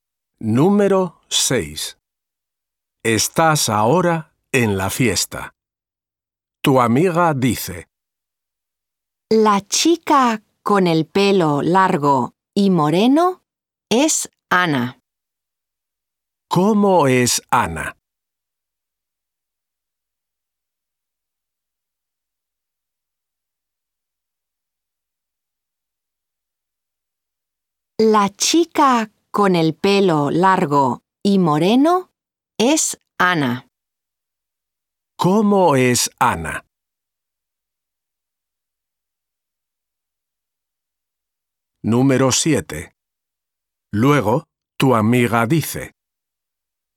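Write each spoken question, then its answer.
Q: ¿Cómo es Ana?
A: Tiene el pelo largo y moreno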